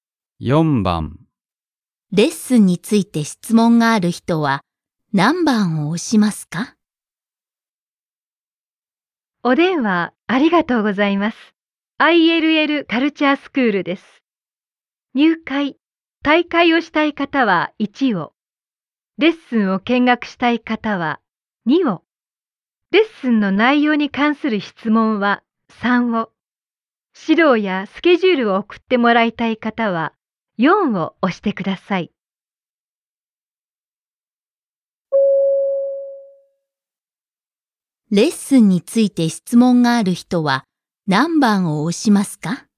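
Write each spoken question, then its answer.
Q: レッスンについて質問がある人は何番を押しますか?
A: 3番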